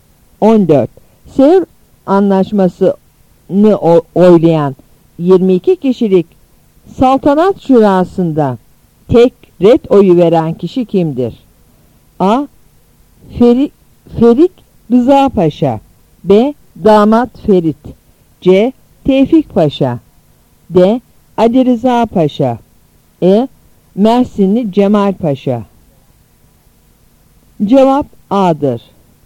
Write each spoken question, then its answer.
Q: Sevr anlaşmasını oylayan 22 kişilik saltanat şurasında tek red oyu veren kişi kimdir?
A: Cevap A'dır.